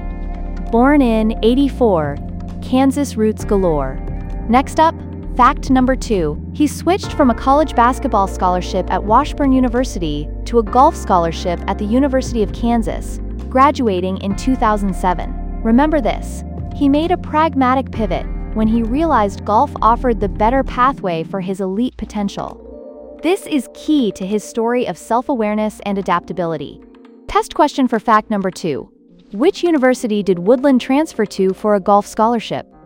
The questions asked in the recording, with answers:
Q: Which university did Woodland transfer to for a golf scholarship?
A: University of Kansas.